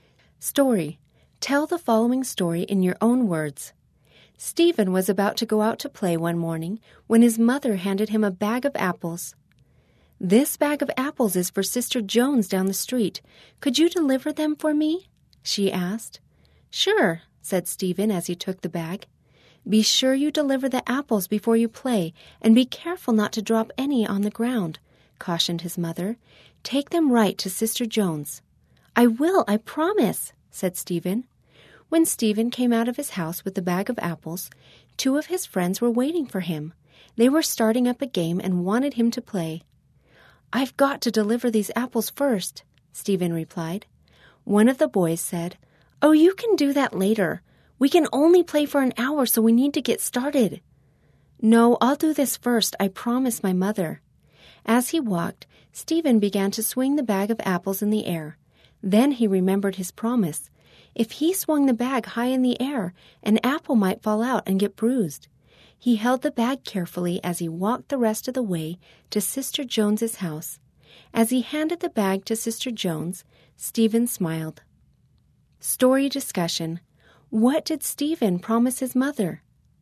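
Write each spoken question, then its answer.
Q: What did Stephen promise his mother?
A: To deliver the apples to Sister Jones before playing, without dropping any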